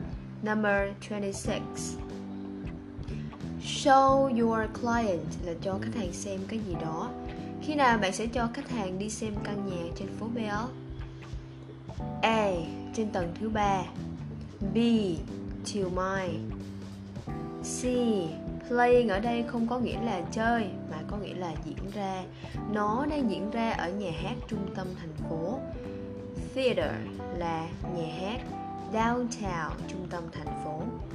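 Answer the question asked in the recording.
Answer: B: Chiều mai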